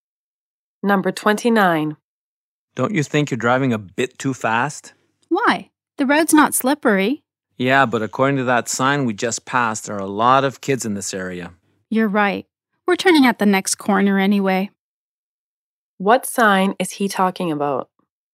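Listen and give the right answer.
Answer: A sign warning of children in the area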